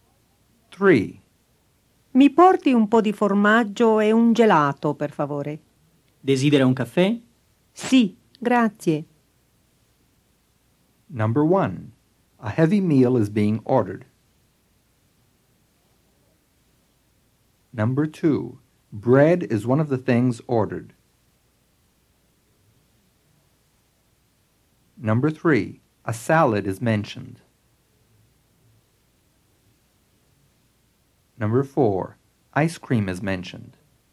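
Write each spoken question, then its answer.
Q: A heavy meal is being ordered.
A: False

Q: Bread is one of the things ordered.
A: False

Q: A salad is mentioned.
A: False

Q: Ice cream is mentioned.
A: True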